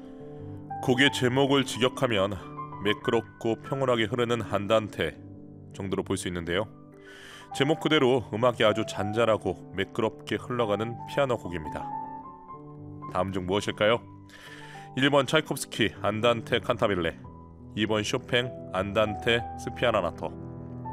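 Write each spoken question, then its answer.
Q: 다음 중 무엇일까요? 1번 차이콥스키 안단테 칸타빌레, 2번 쇼팽 안단테 스피아나나토.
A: 2: 쇼팽 안단테 스피아나나토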